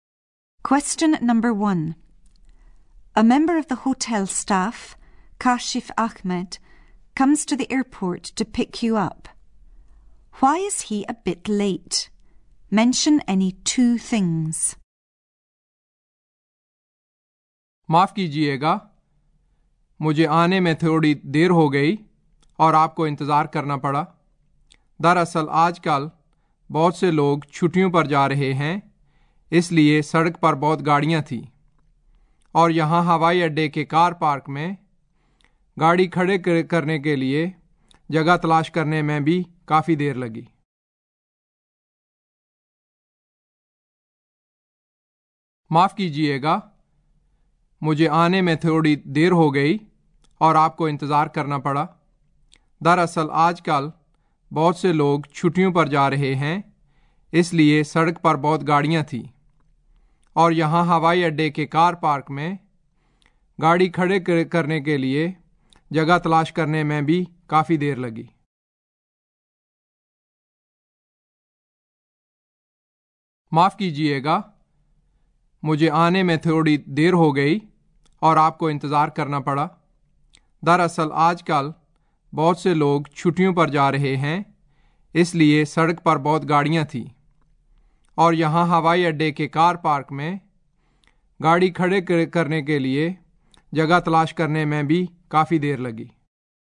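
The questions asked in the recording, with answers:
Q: Why is he a bit late? Mention any two things.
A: Many people going on holiday so heavy traffic; took a long time to find a parking space at the airport car park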